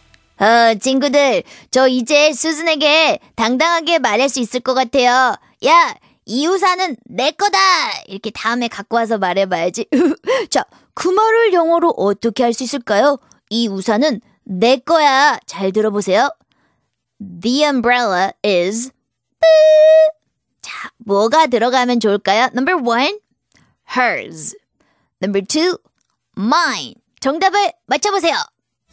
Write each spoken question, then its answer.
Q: 이 우산은 내 거야. 잘 들어보세요. The umbrella is...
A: The umbrella is mine.